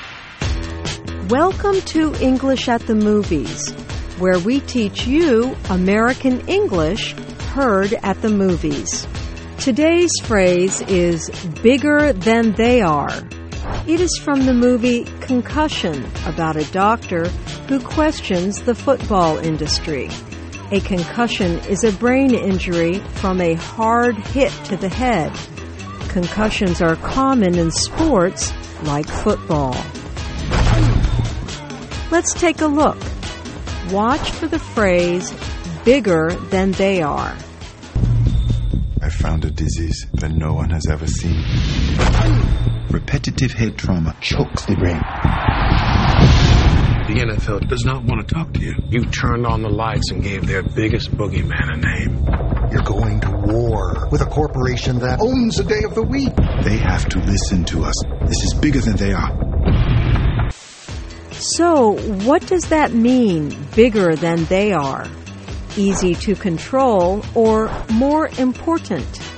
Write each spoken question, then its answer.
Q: So, what does that mean, bigger than they are? Easy to control or more important?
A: In this example, bigger than they are means more important.